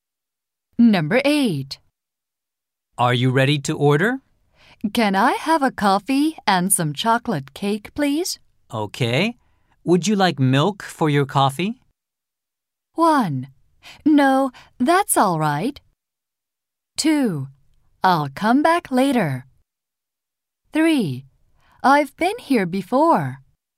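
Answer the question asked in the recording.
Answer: 1: No, that's all right.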